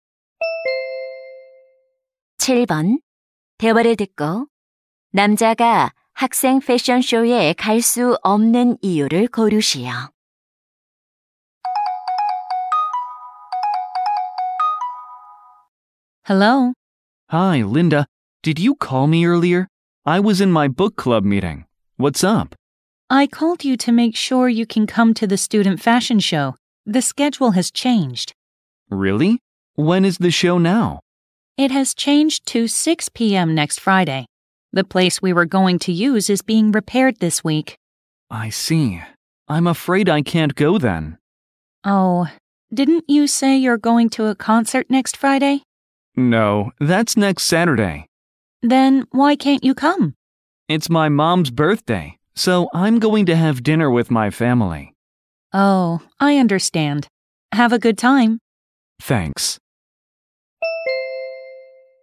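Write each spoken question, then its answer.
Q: 대화를 듣고 남자가 학생 패션쇼에 갈 수 없는 이유를 고르시오.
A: 엄마 생신이라 가족과 저녁 식사를 해야 해서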